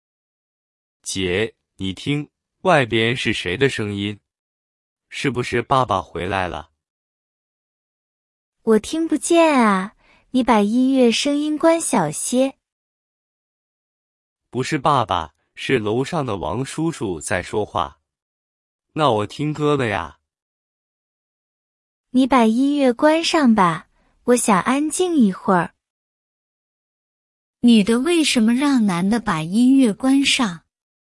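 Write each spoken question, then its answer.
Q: 女的为什么让男的把音乐关上?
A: 她想安静一会儿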